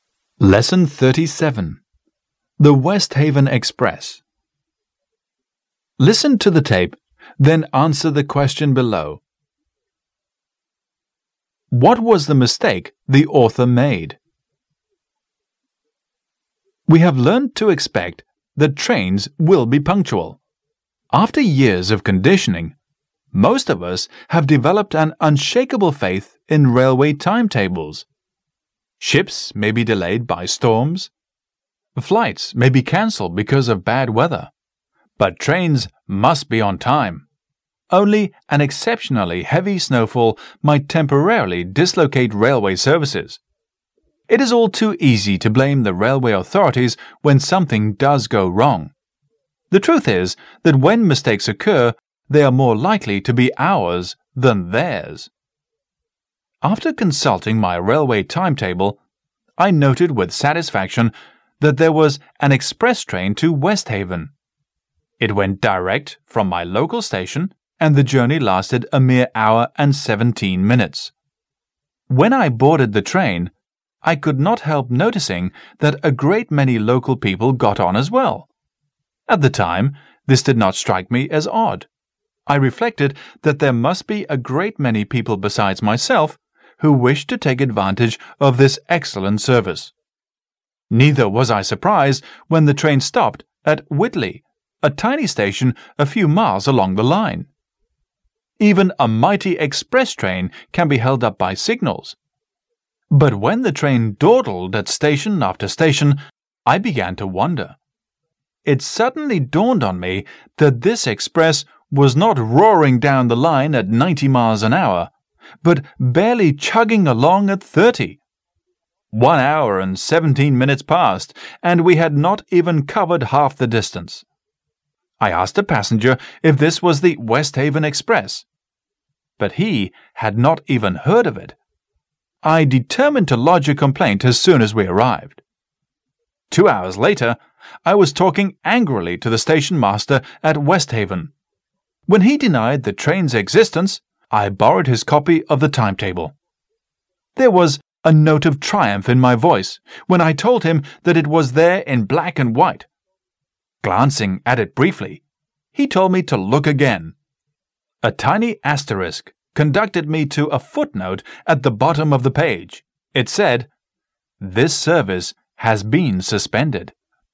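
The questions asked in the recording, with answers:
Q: What was the mistake the author made?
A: He didn't notice the footnote saying the express service had been suspended, so he caught a slow train.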